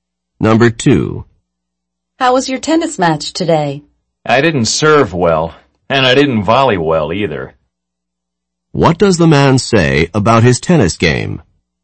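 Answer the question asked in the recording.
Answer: He served and volleyed poorly; he played badly.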